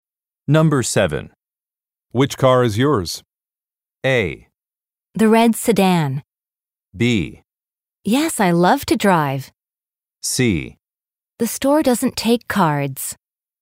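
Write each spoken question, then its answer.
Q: Which car is yours?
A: A: The red sedan.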